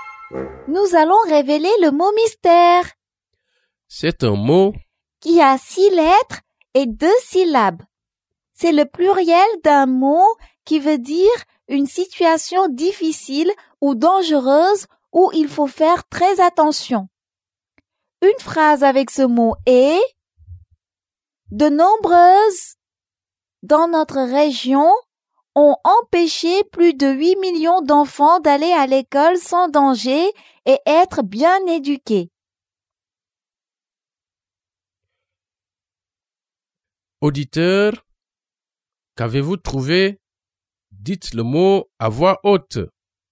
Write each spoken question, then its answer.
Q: Auditeur, qu'avez-vous trouvé?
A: Le mot mystère est crise.